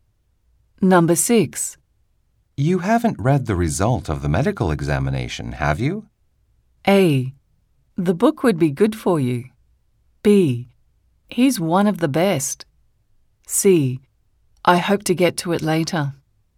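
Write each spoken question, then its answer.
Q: You haven't read the result of the medical examination, have you?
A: C: I hope to get to it later.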